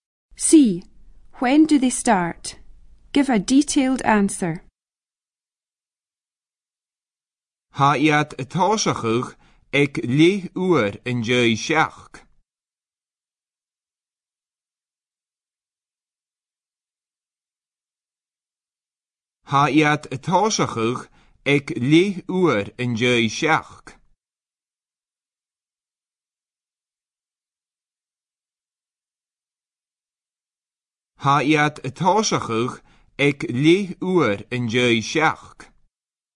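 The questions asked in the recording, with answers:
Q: When do they start?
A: At half past seven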